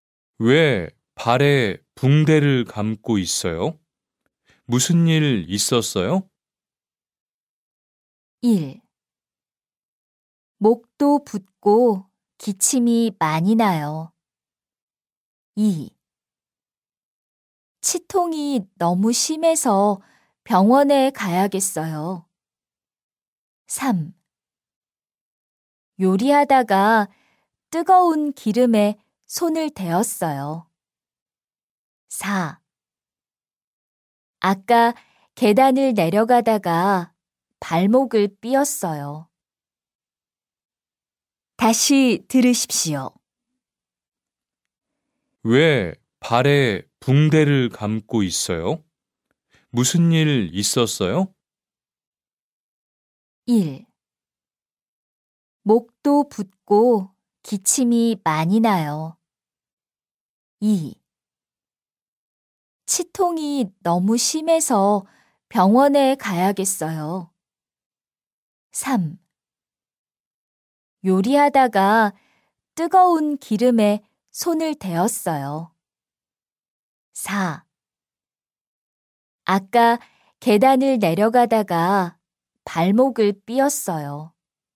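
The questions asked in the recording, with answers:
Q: 왜 발에 붕대를 감고 있어요? 무슨 일 있었어요?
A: 4: 아까 계단을 내려가다가 발목을 삐었어요.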